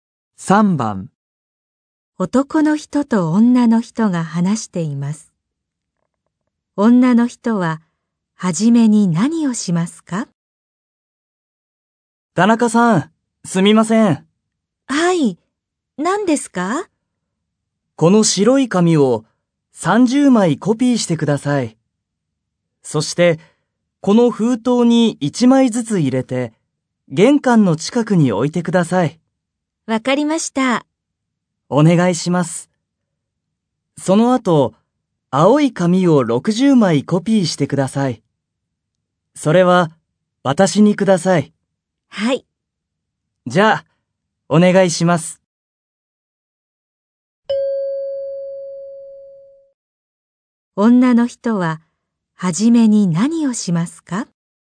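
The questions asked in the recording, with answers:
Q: 女の人は初めに何をしますか?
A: 白い紙を30枚コピーする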